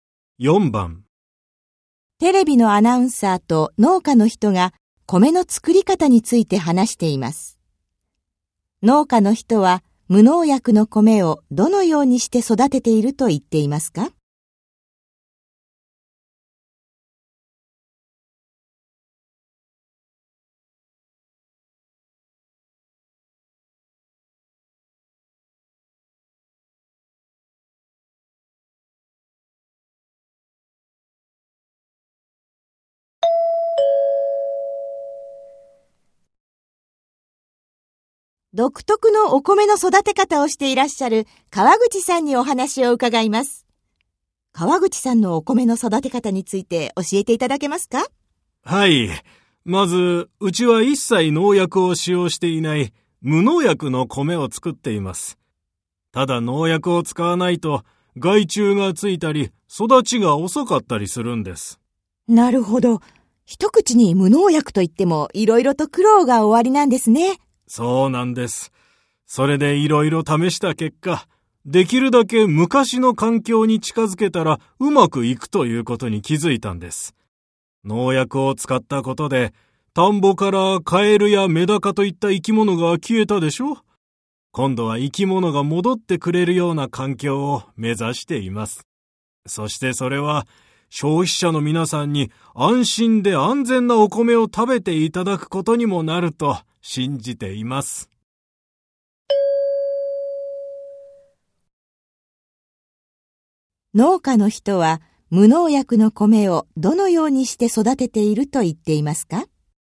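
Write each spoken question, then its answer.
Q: 農家の人は無農薬の米をどのようにして育てていると言っていますか?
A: できるだけ昔の環境に近づけ、カエルやメダカなどの生き物が戻ってくるような環境で育てている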